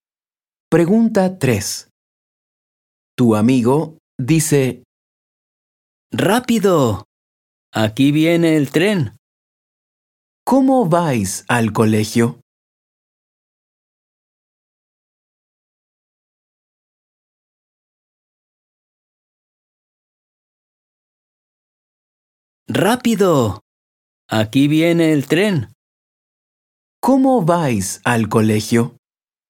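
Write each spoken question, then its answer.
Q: ¿Cómo vais al colegio?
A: En tren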